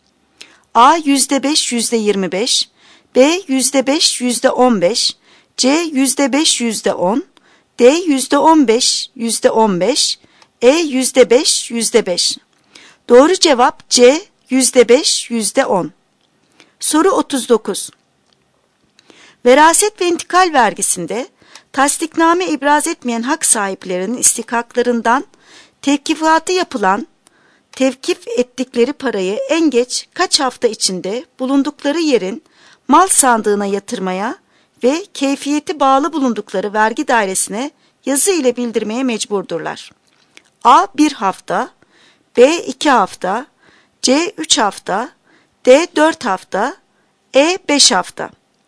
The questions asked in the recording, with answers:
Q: Veraset ve intikal vergisinde tasdikname ibraz etmeyen hak sahiplerinin istikaklarından tevkifatı yapılan tevkif ettikleri parayı en geç kaç hafta içinde bulundukları yerin mal sandığına yatırmaya ve keyfiyeti bağlı bulundukları vergi dairesine yazı ile bildirmeye mecburdurlar?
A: Doğru cevap A. 1 hafta.